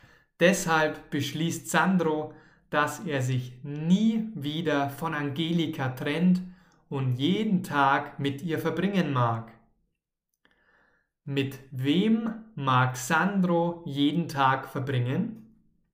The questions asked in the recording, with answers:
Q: Mit wem mag Sandro jeden Tag verbringen?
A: Mit Angelika natürlich, mit seiner neuen Freundin.